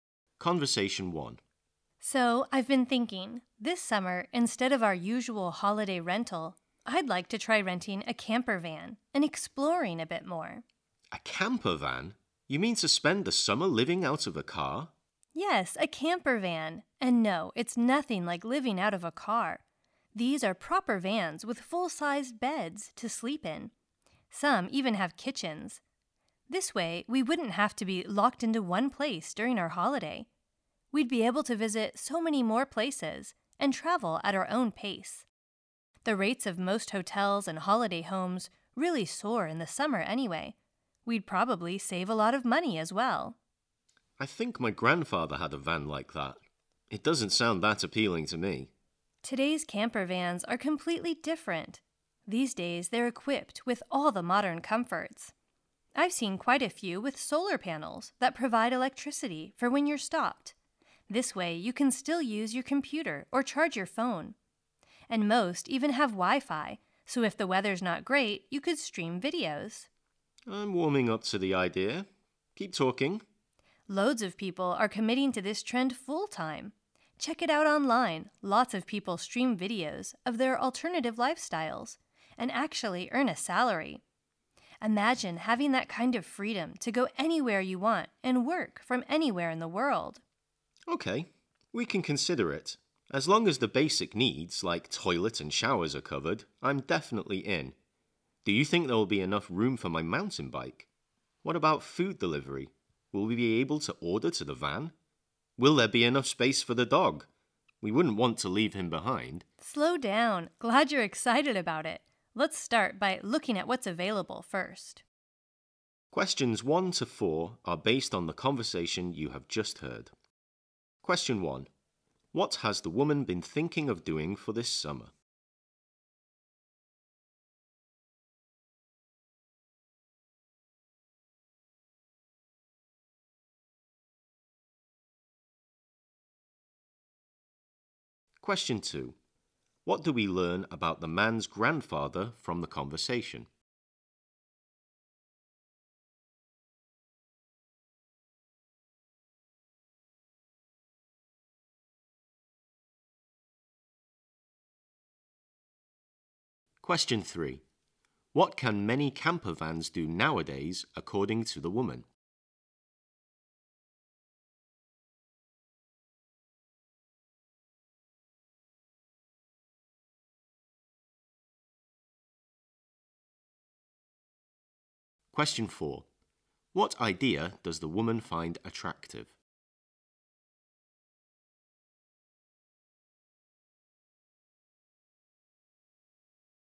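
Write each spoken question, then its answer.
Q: What has the woman been thinking of doing for this summer?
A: Renting a camper van and exploring more places

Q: What do we learn about the man's grandfather from the conversation?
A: He had a van like that (a camper van)

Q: What can many camper vans do nowadays, according to the woman?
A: Provide electricity with solar panels when stopped, and offer Wi-Fi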